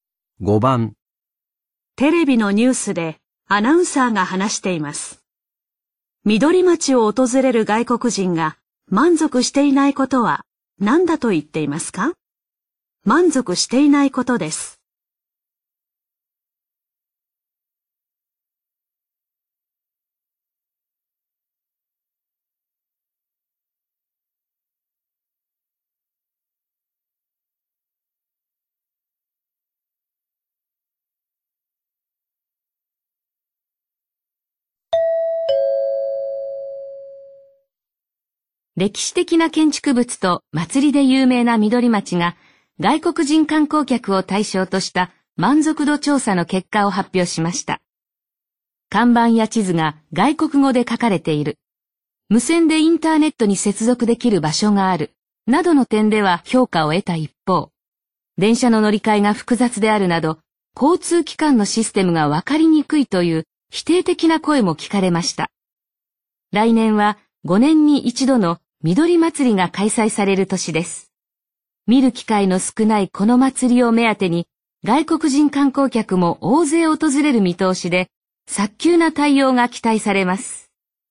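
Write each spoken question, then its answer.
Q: 緑町を訪れる外国人が満足していないことは何だと言っていますか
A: 交通機関のシステムがわかりにくいこと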